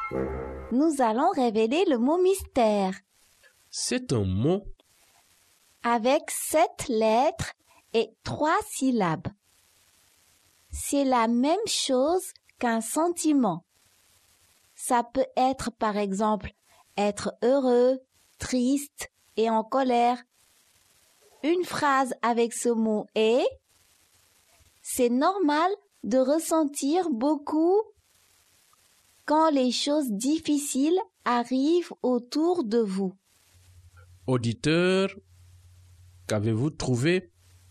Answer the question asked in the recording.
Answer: Le mot mystère est émotion.